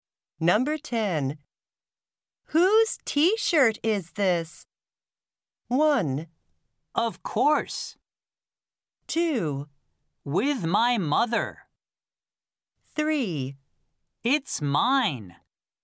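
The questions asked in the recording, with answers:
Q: Whose t-shirt is this?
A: 3: It's mine.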